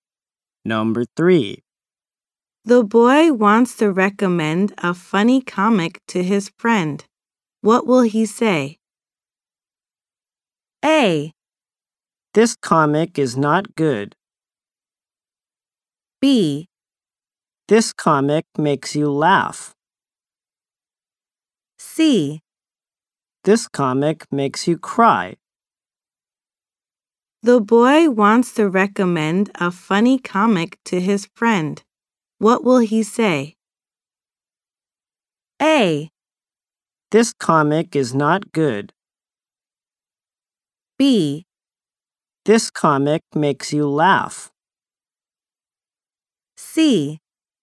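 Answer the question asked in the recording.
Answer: B: This comic makes you laugh.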